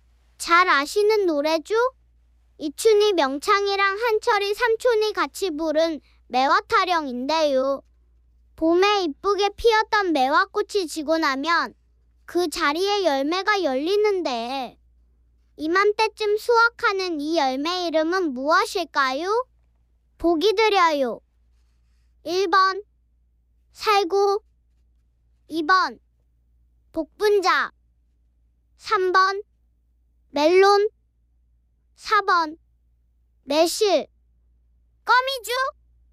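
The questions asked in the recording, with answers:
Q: 봄에 이쁘게 피었던 매화꽃이 지고 나면 그 자리에 열매가 열리는데 이맘때쯤 수확하는 이 열매 이름은 무엇일까요?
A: 4: 매실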